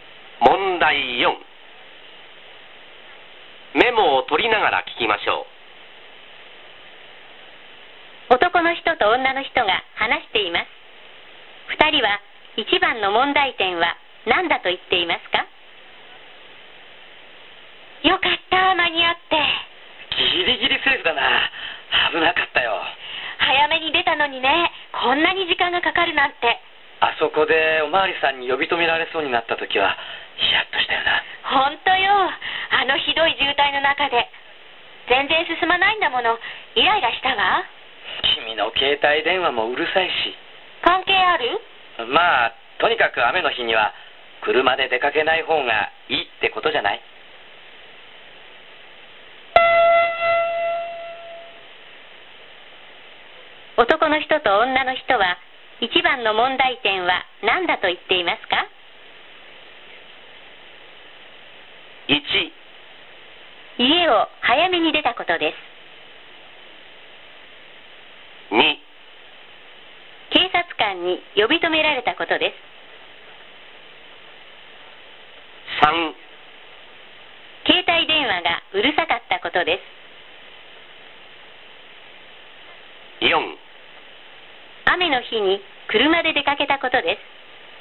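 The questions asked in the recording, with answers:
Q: 男の人と女の人は一番の問題点は何だと言っていますか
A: 4: 雨の日に車で出かけたことです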